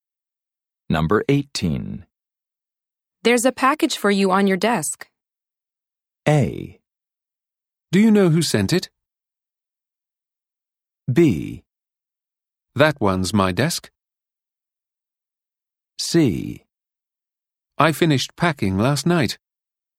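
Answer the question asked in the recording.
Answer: A: Do you know who sent it?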